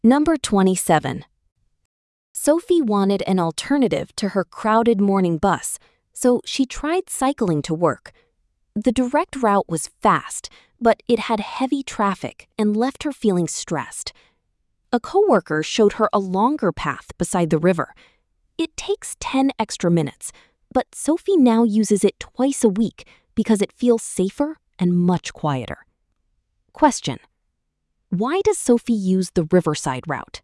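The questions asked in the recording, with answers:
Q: why does Sophie use the riverside route?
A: Because it feels safer and much quieter.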